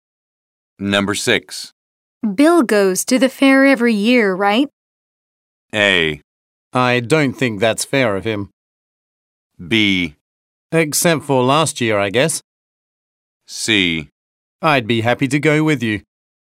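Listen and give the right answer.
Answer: B: Except for last year, I guess.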